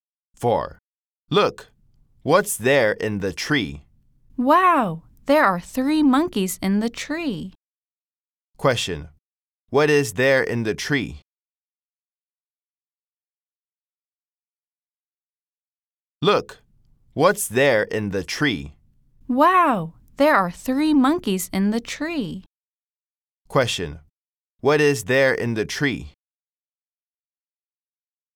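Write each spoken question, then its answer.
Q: Question. What is there in the tree?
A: Three monkeys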